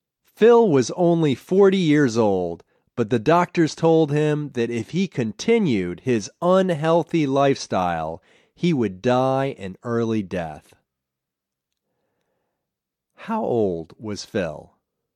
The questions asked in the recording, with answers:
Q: How old was Phil?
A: Phil was only 40 years old.